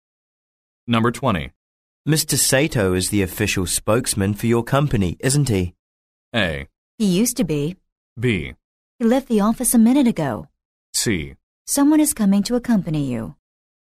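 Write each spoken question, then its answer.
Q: Mr. Sato is the official spokesman for your company, isn't he?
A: A: He used to be.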